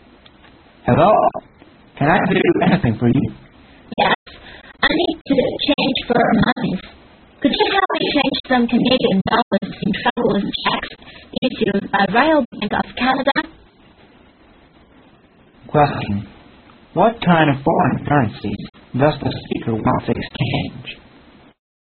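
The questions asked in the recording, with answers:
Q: What kind of foreign currency does the speaker want to exchange?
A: Canadian dollars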